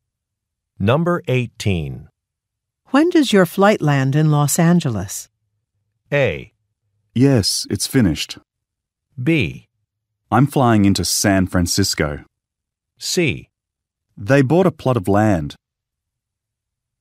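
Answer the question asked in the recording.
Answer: B: I'm flying into San Francisco.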